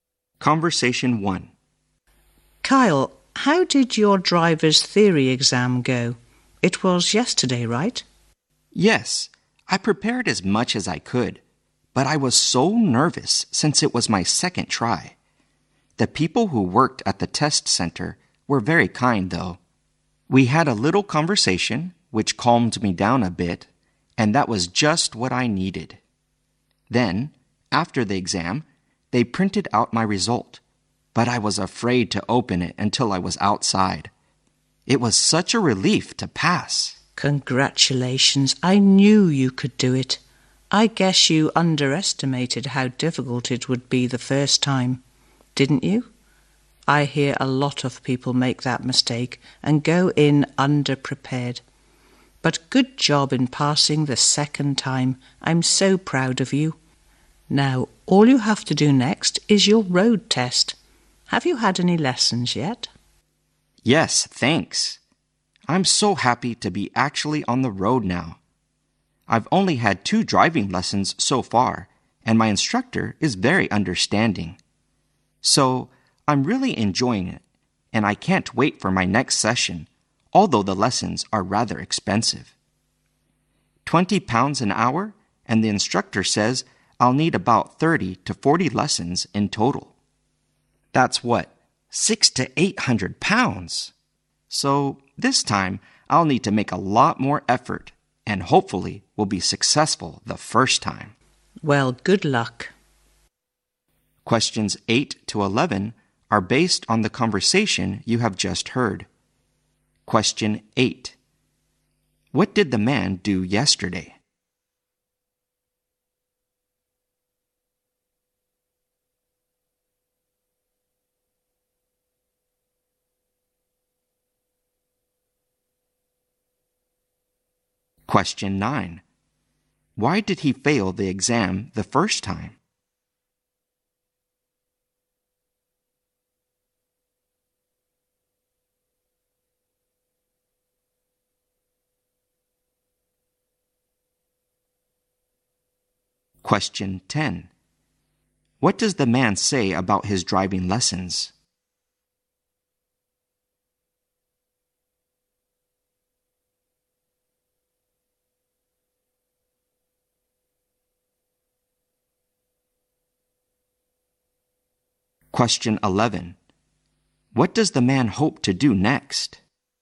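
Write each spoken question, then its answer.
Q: What did the man do yesterday?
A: He took his driver's theory exam and passed it.

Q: Why did he fail the exam the first time?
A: He underestimated how hard it was and went in underprepared.

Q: What does the man say about his driving lessons?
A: He enjoys them, but they are rather expensive.

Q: What does the man hope to do next?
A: Pass his road test on the first try.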